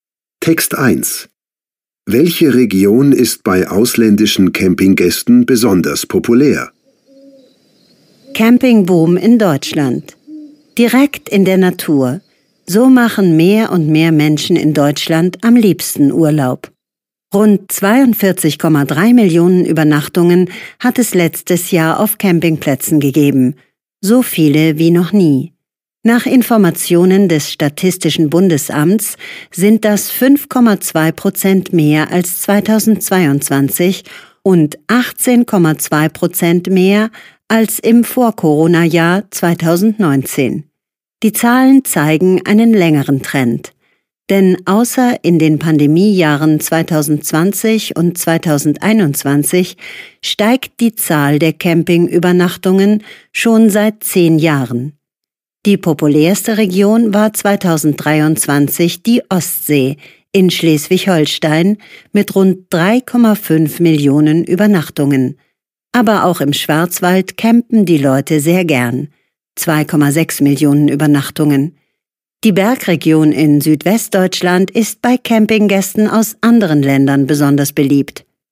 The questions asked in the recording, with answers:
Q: Welche Region ist bei ausländischen Campinggästen besonders populär?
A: Der Schwarzwald, die Bergregion im Südwesten Deutschlands, ist bei Campinggästen aus anderen Ländern besonders populär.